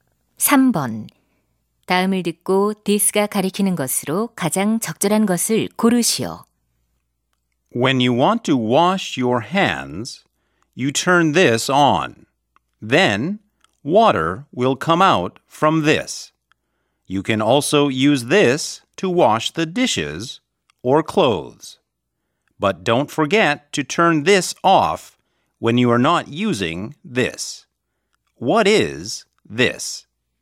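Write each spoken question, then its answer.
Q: 다음을 듣고 디스가 가리키는 것으로 가장 적절한 것을 고르시오.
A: 수도꼭지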